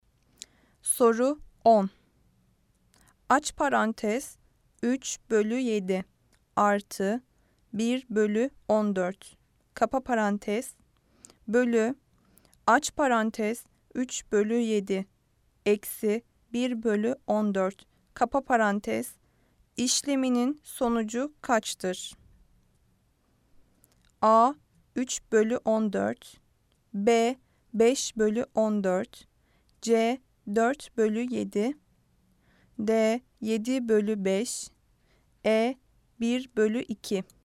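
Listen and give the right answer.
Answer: D: 7 bölü 5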